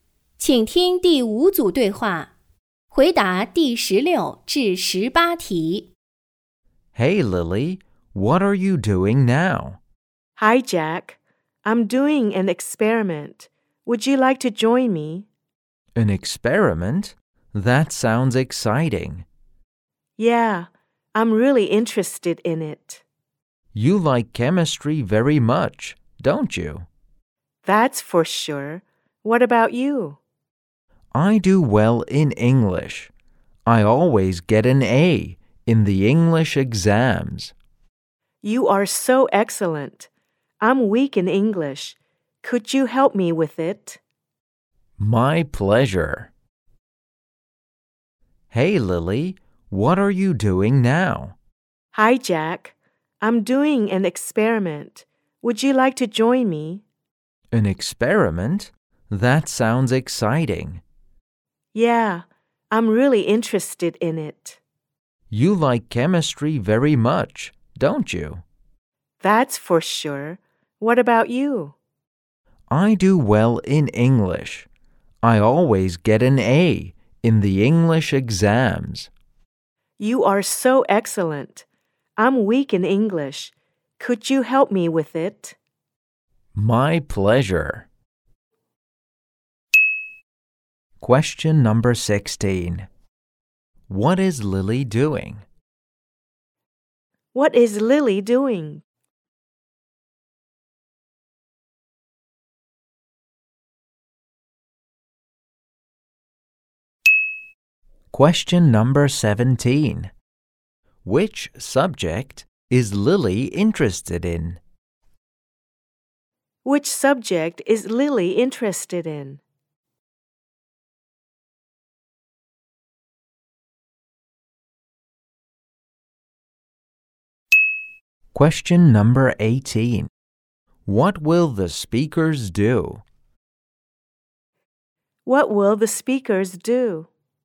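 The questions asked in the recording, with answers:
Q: What is Lily doing?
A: Doing an experiment

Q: Which subject is Lily interested in?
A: Chemistry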